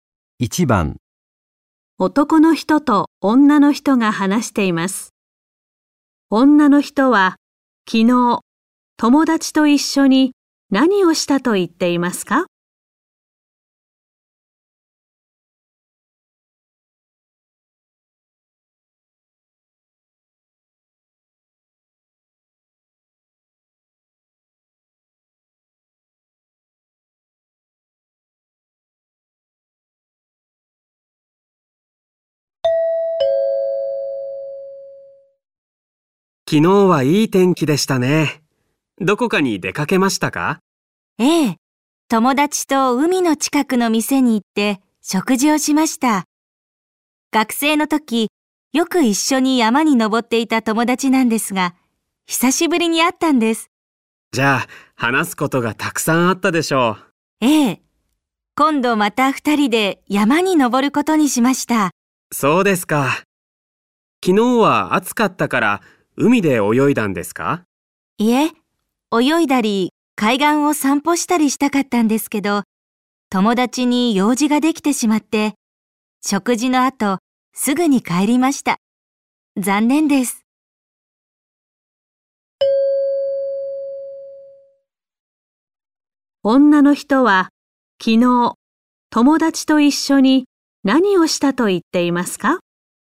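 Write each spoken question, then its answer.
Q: 女の人は昨日友達と一緒に何をしたと言っていますか?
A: 海の近くの店で食事をした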